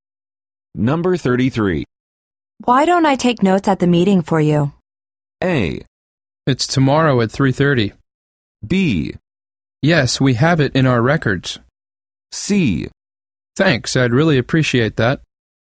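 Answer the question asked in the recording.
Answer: C: Thanks, I'd really appreciate that.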